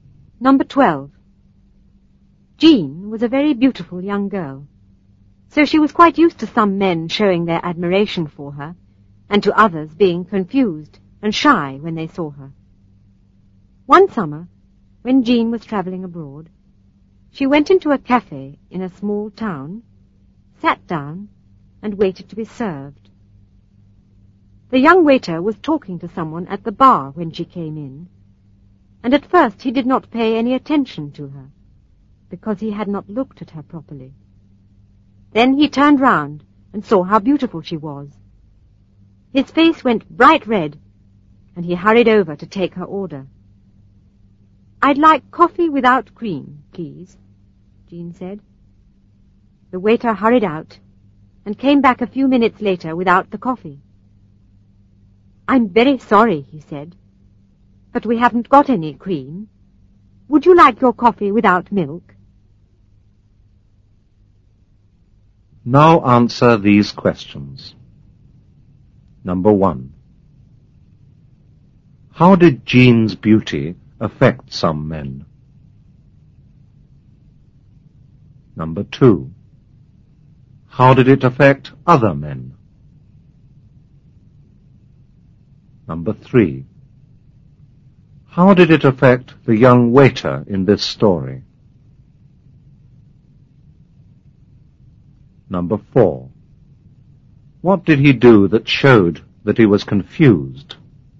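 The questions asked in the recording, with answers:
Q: How did Jean's beauty affect some men?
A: They showed their admiration for her.

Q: How did it affect other men?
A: They became confused and shy.

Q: How did it affect the young waiter in this story?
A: His face went bright red and he became confused.

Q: What did he do that showed that he was confused?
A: He said there was no cream and asked if she wanted her coffee without milk instead.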